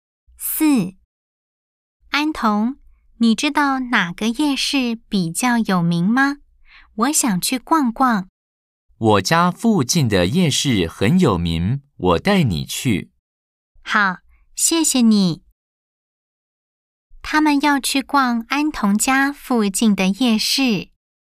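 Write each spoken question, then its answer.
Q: 他们要去逛安童家附近的夜市。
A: O (true)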